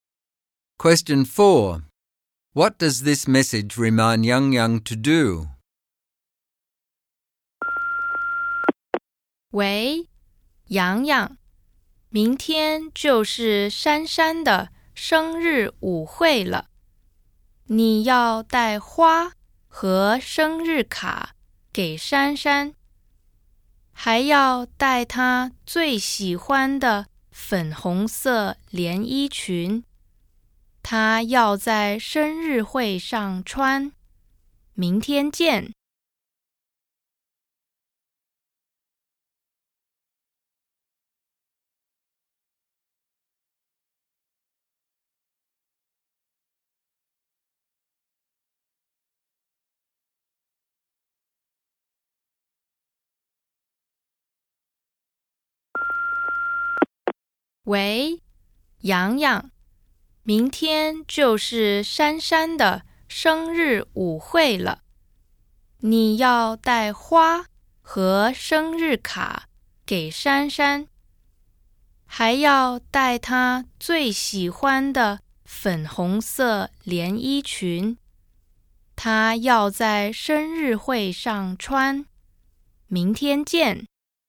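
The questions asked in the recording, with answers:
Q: What does this message remind Yang Yang to do?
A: Bring flowers, a birthday card and Shanshan's favourite pink dress to her birthday party tomorrow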